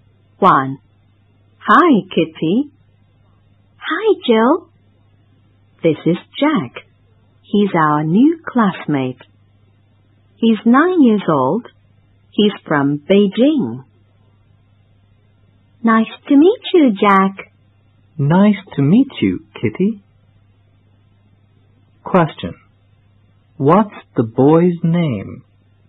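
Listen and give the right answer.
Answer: Jack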